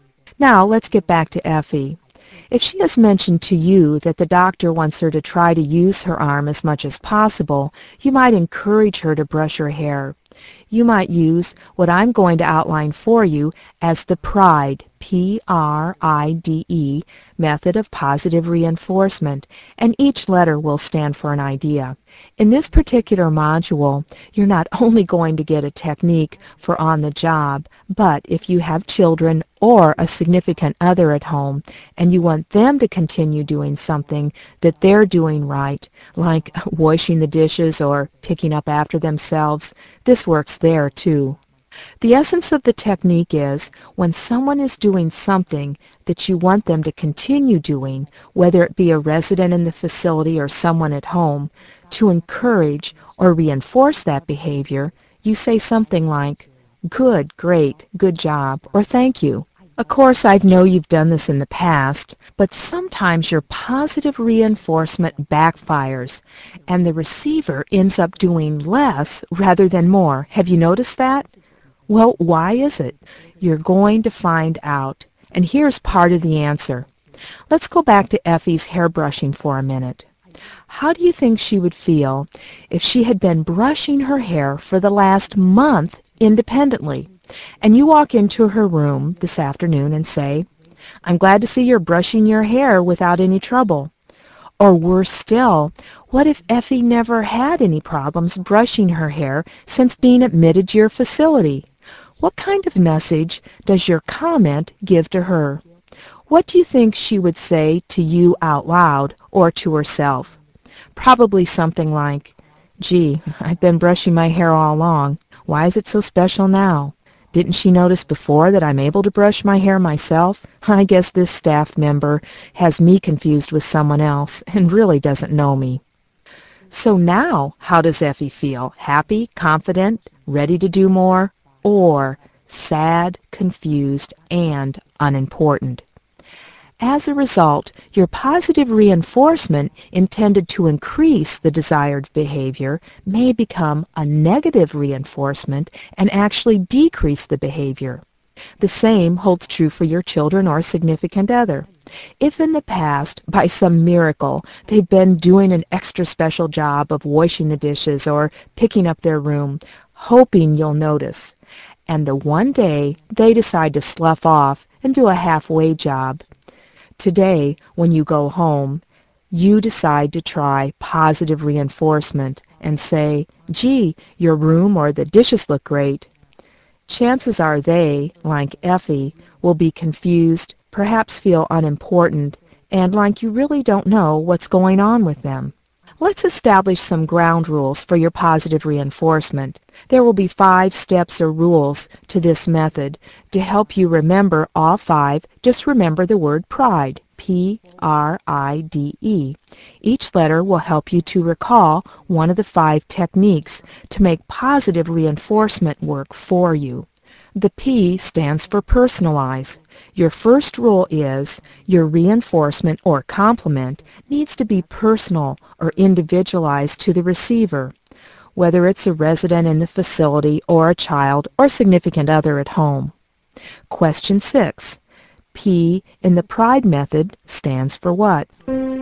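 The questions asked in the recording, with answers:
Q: P in the pride method stands for what?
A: Personalize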